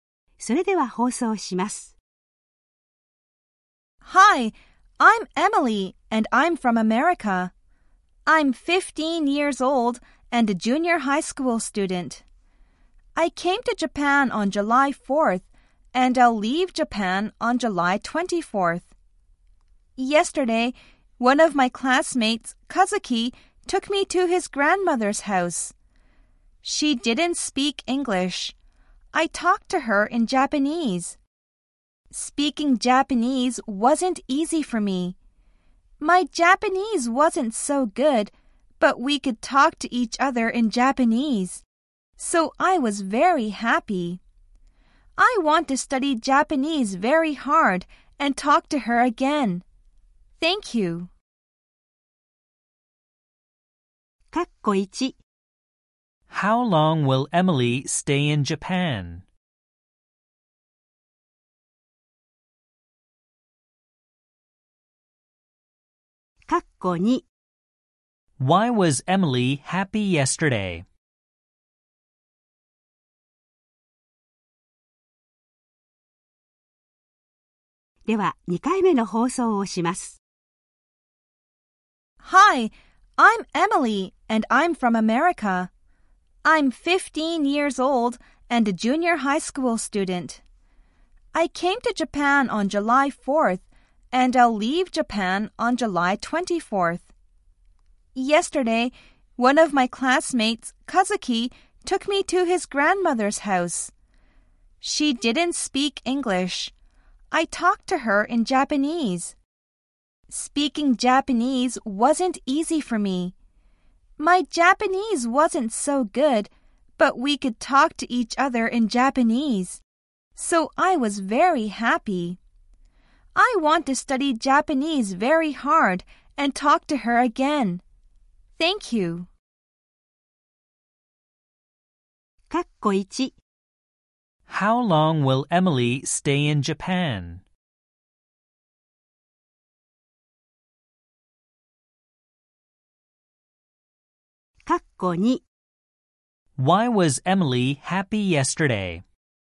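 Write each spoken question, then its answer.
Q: How long will Emily stay in Japan?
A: For 20 days (July 4th to July 24th)

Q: Why was Emily happy yesterday?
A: Because she could talk to Kazuki's grandmother in Japanese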